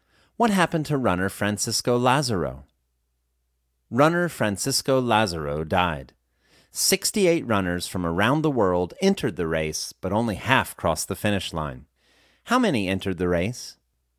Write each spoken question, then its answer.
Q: How many entered the race?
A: 68 runners entered the race.